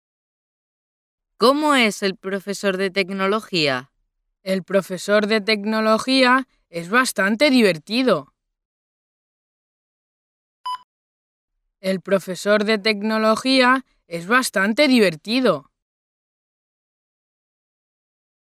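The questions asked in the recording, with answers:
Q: ¿Cómo es el profesor de tecnología?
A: bastante divertido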